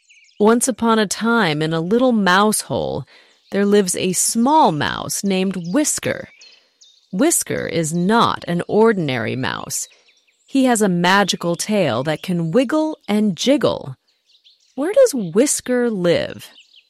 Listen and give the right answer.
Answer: In a little mouse hole. He lives in a little mouse hole.